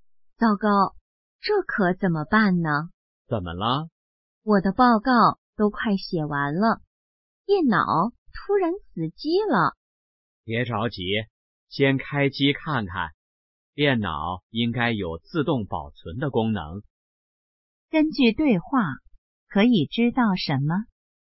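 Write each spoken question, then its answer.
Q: 根据对话,可以知道什么?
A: 电脑突然死机了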